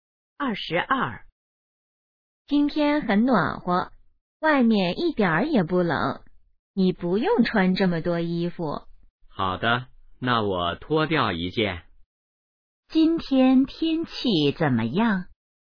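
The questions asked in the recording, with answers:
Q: 今天天气怎么样?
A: 很暖和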